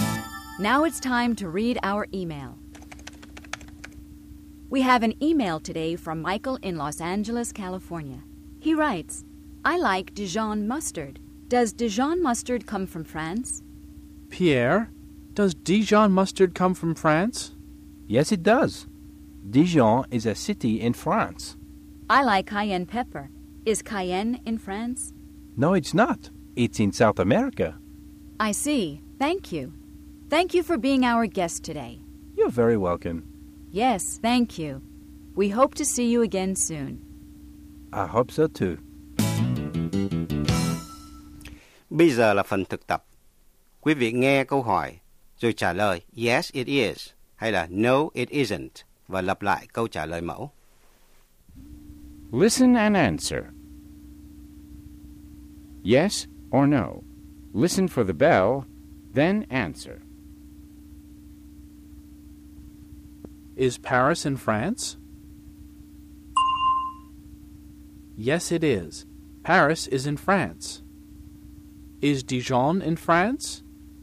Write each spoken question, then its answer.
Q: Is Dijon in France?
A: Yes, it is. Dijon is in France.